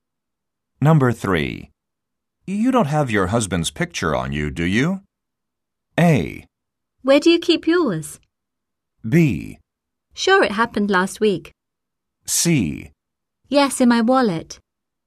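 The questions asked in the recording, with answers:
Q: You don't have your husband's picture on you, do you?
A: C: Yes, in my wallet.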